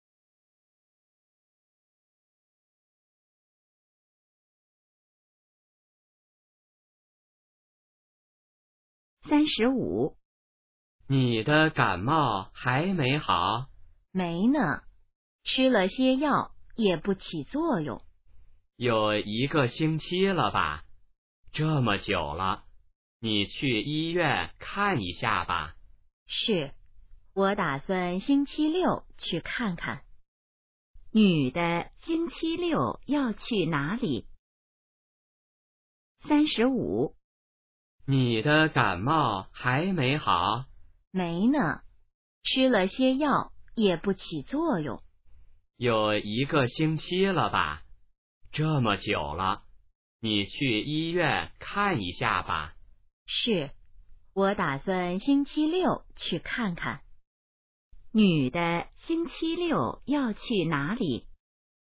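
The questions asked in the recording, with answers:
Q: 女的星期六要去哪里?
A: 医院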